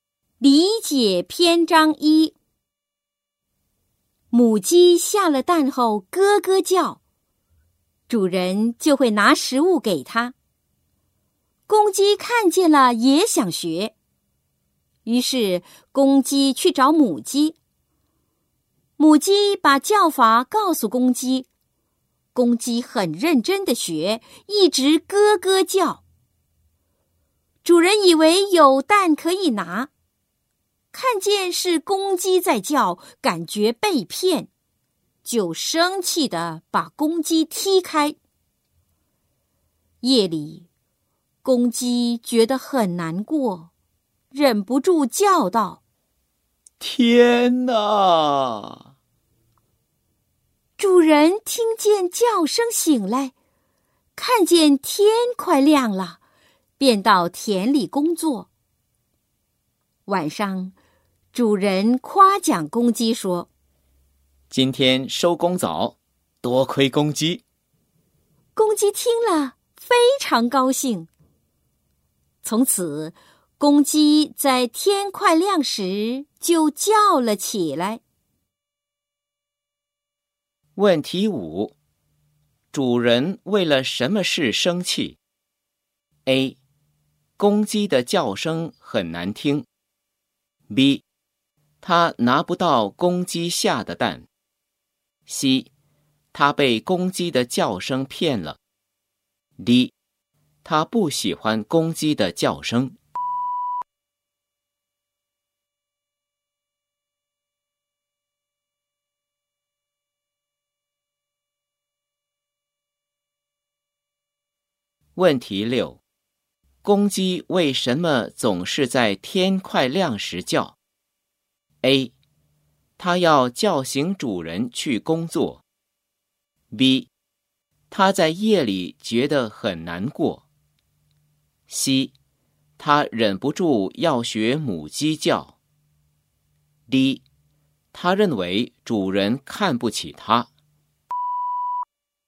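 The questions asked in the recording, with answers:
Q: 主人为了什么事生气 ?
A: C: 他被公鸡的叫声骗了。

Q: 公鸡为什么总是在天快亮时叫 ?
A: A: 它要叫醒主人去工作。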